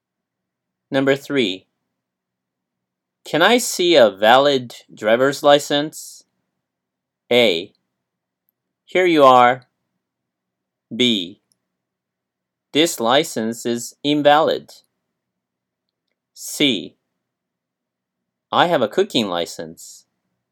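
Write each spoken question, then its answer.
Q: Can I see a valid driver's license?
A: A: Here you are.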